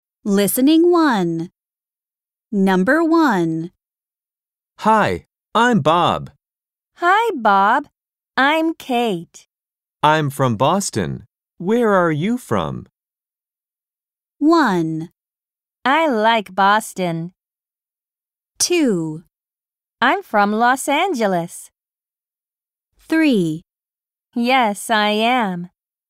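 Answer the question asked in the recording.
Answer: 2: I'm from Los Angeles.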